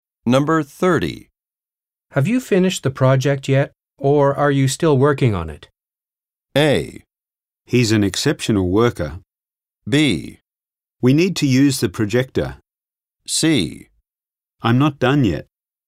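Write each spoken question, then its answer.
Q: Have you finished the project yet, or are you still working on it?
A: C: I'm not done yet.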